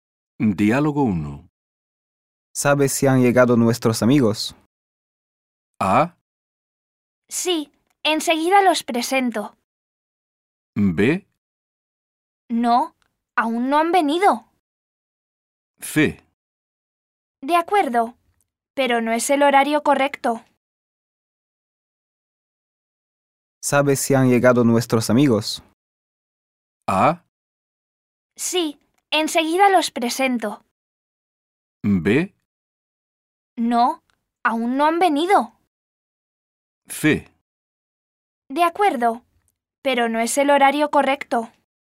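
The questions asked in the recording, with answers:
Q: ¿Sabes si han llegado nuestros amigos?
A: B: No, aún no han venido.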